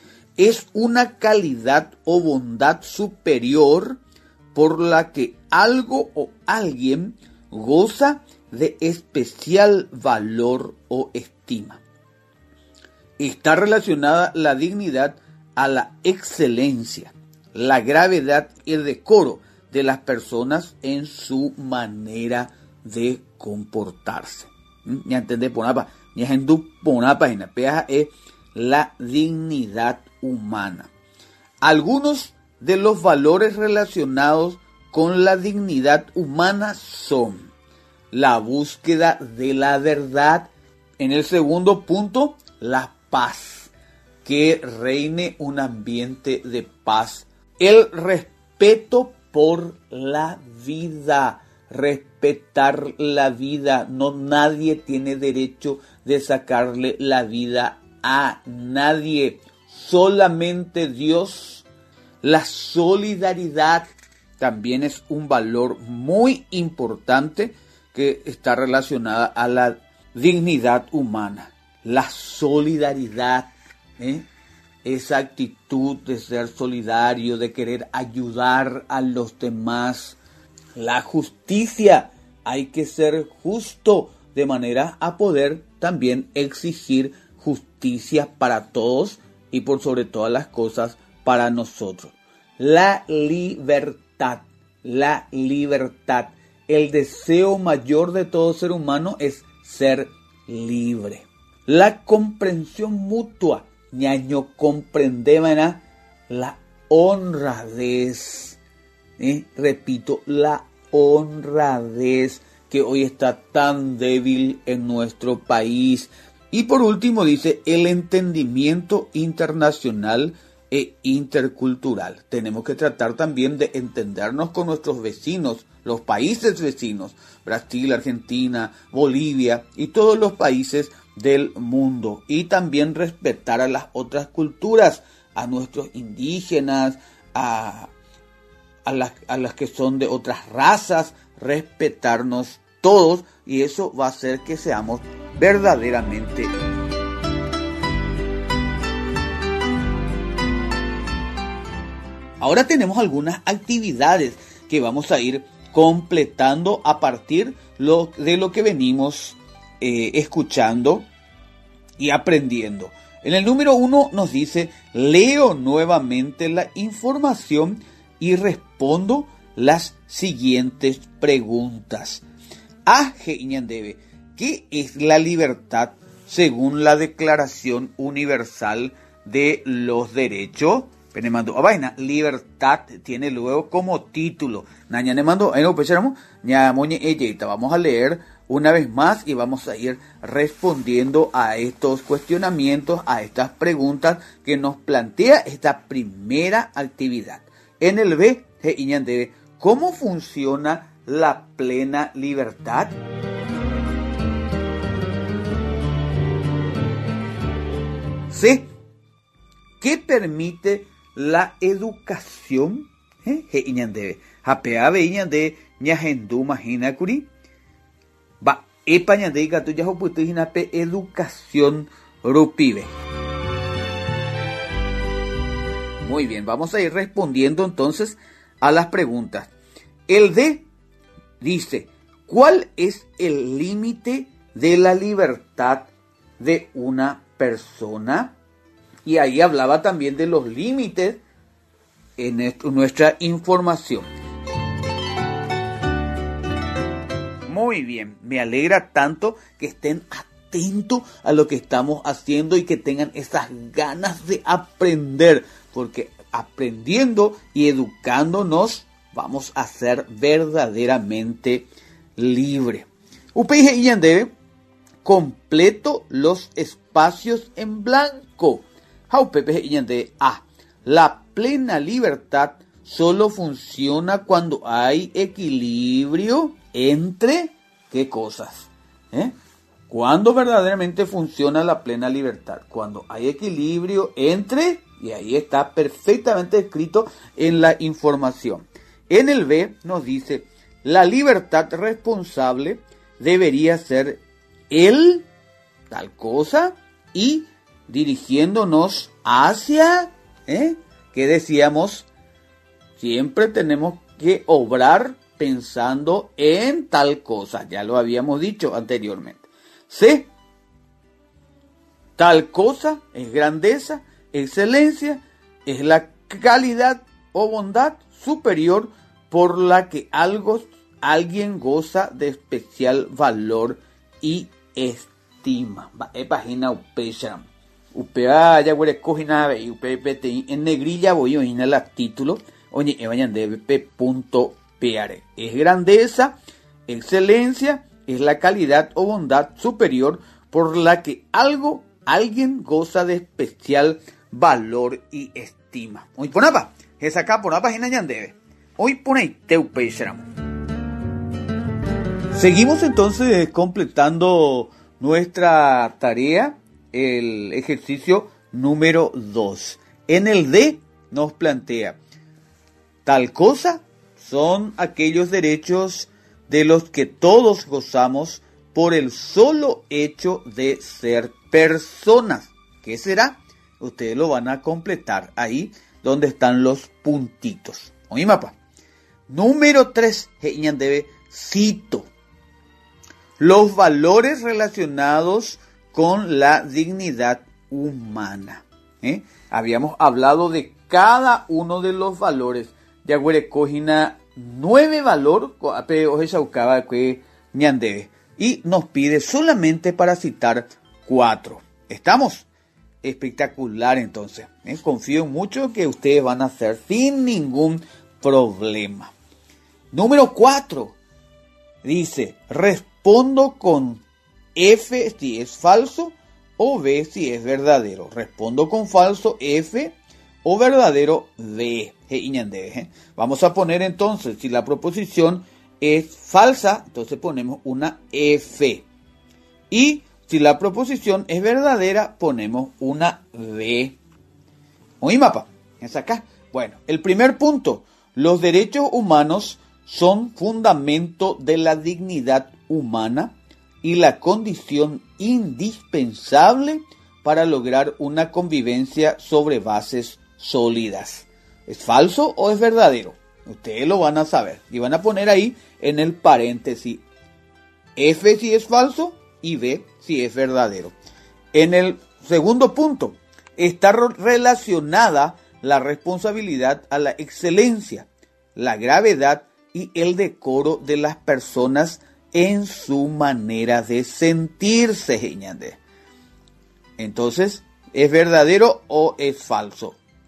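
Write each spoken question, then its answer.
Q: En el segundo punto, está relacionada la responsabilidad a la excelencia, la gravedad y el decoro de las personas en su manera de sentirse, Geñande. Entonces, ¿es verdadero o es falso?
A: Falso (es la dignidad, no la responsabilidad)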